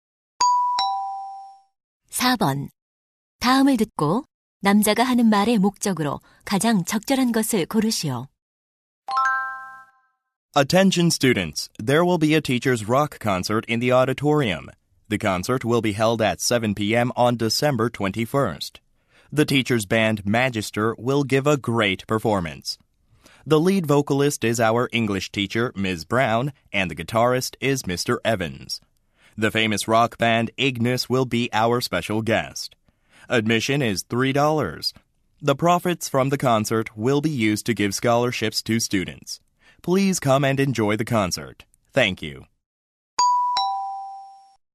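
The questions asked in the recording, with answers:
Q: 다음을 듣고 남자가 하는 말의 목적으로 가장 적절한 것을 고르시오.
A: 교사 록 콘서트를 홍보하고 참석을 권하려고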